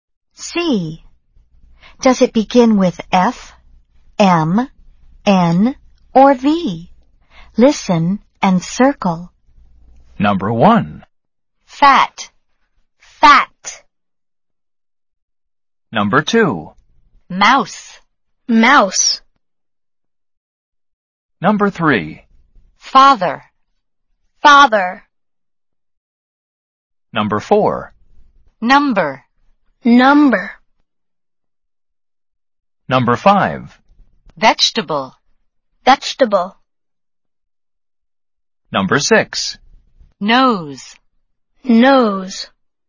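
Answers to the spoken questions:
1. F (fat)
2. M (mouse)
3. F (father)
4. N (number)
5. V (vegetable)
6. N (nose)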